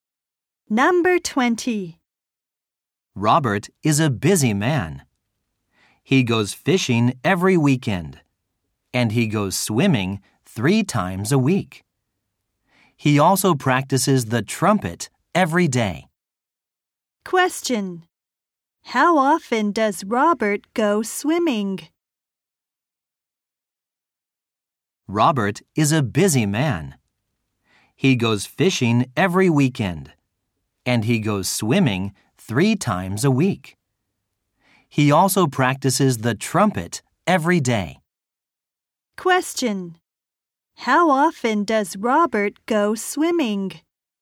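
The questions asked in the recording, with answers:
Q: How often does Robert go swimming?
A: Three times a week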